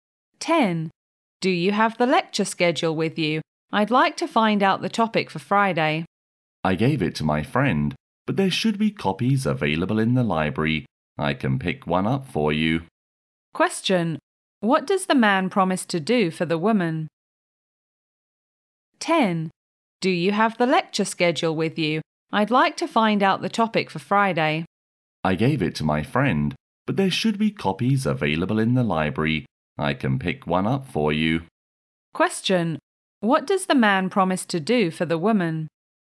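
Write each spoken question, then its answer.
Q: What does the man promise to do for the woman?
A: Pick up a copy of the lecture schedule from the library for her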